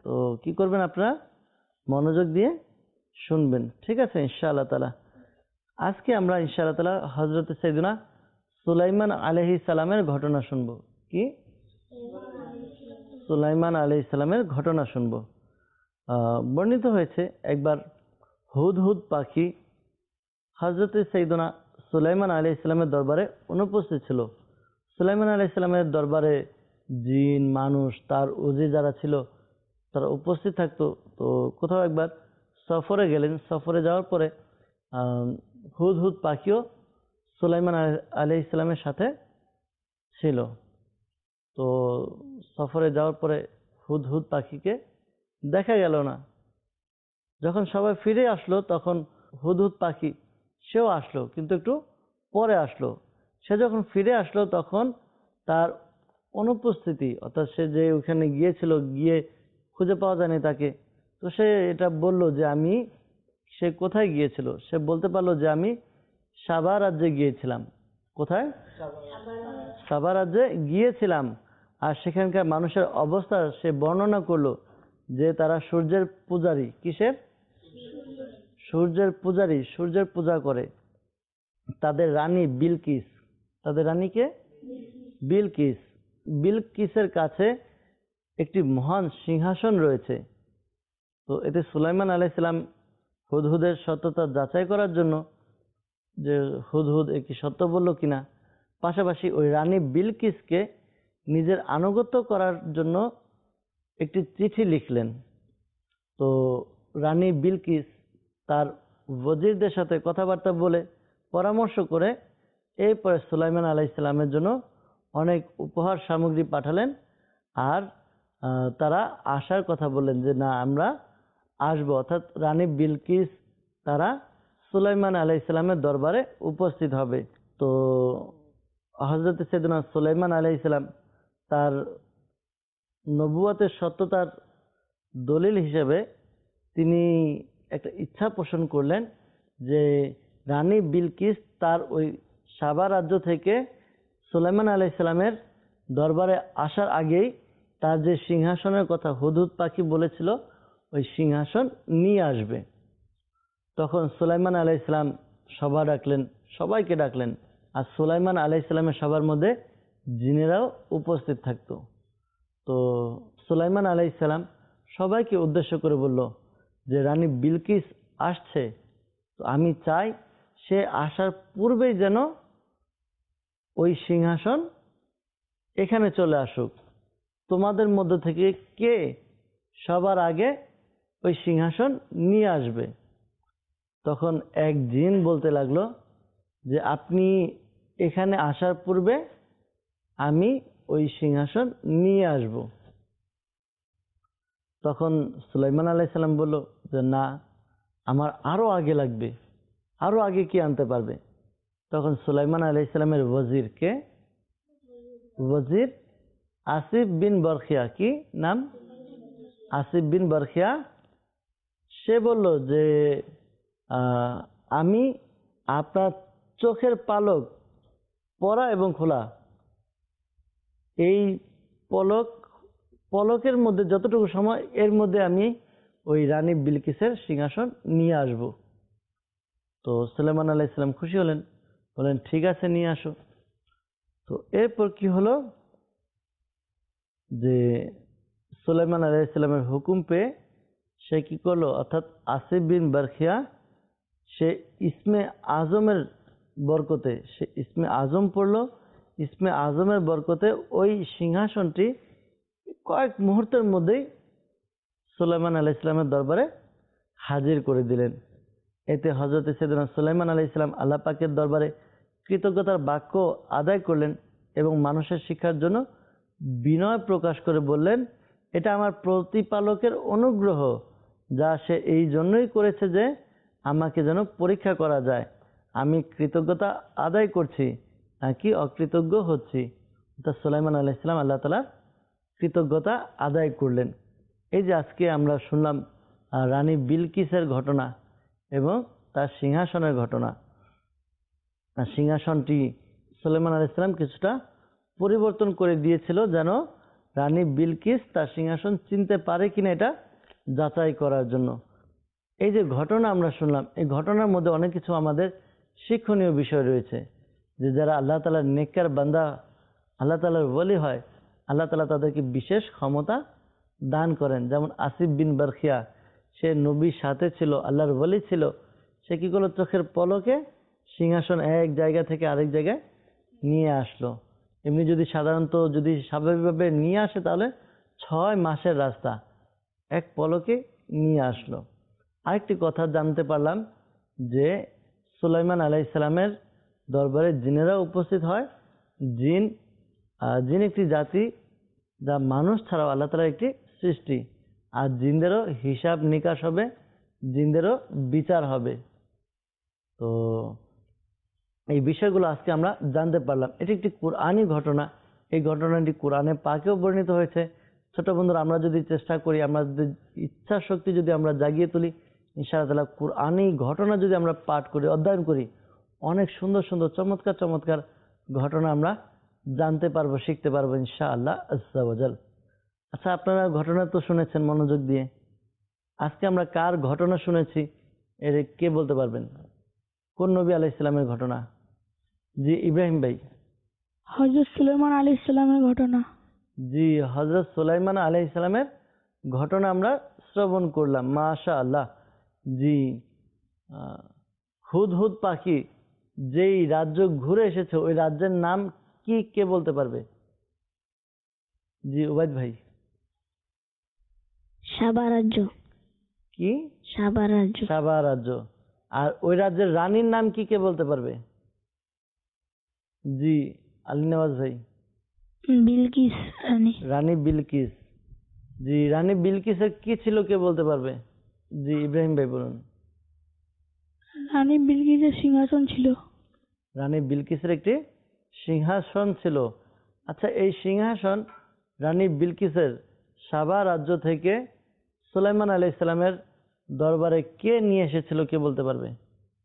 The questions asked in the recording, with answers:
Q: আজকে আমরা কার ঘটনা শুনেছি এর কে বলতে পারবেন?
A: হযরত সুলাইমান আলাইহিসসালামের ঘটনা।

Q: হুদহুদ পাখি যেই রাজ্য ঘুরে এসেছে ওই রাজ্যের নাম কি, কে বলতে পারবে?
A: সাবা রাজ্য।

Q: আর ওই রাজ্যের রানীর নাম কি, কে বলতে পারবে?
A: বিলকিস রানী।

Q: রানী বিলকিসের কি ছিল, কে বলতে পারবে?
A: রানী বিলকিসের সিংহাসন ছিল।

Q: এই সিংহাসন রানী বিলকিসের সাবা রাজ্য থেকে সুলাইমান আলাইহিসসালামের দরবারে কে নিয়ে এসেছিল, কে বলতে পারবে?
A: আসিফ বিন বরখিয়া।